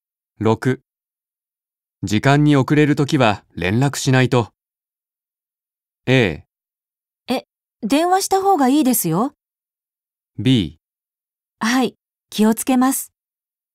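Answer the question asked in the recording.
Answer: B: はい、気をつけます。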